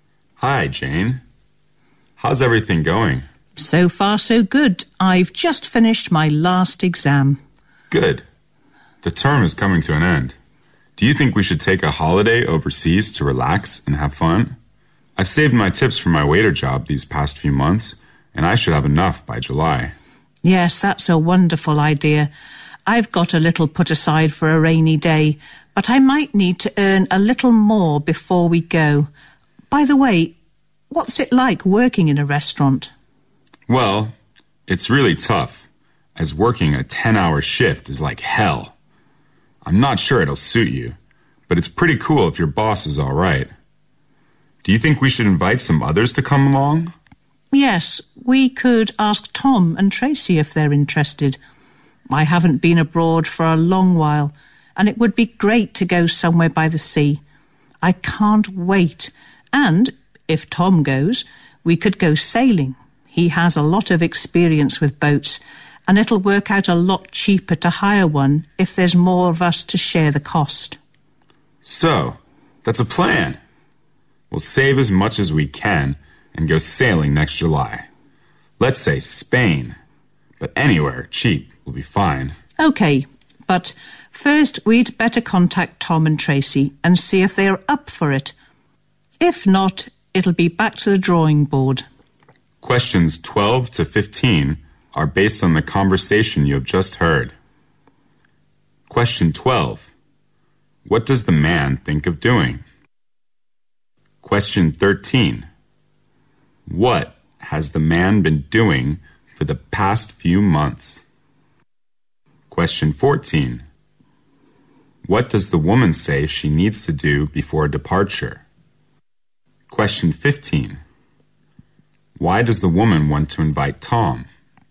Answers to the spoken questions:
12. The man actually is planning traveling to overseas, probably to a place where he can do some sailing.
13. He has been saving the tips from working as a waiter in a restaurant in the past few months.
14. The woman thinks that she probably needs to make more money before the departure, before the trip.
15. You can say that there are two reasons for the woman to invite Tom.